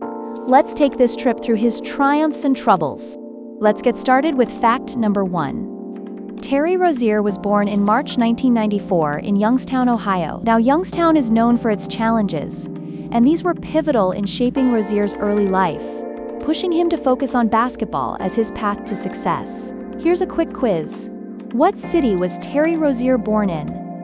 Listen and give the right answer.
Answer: Correct answer, Youngstown.